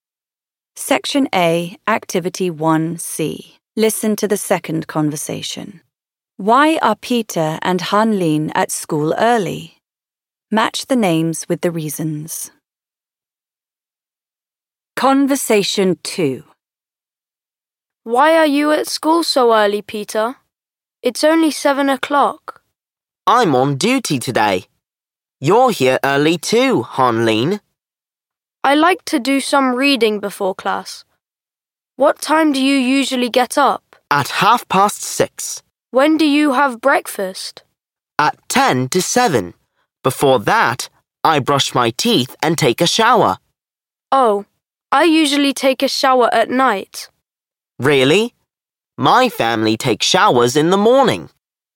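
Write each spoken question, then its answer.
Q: Why are Peter and Hanlin at school early?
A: Peter is on duty today; Hanlin likes to do some reading before class.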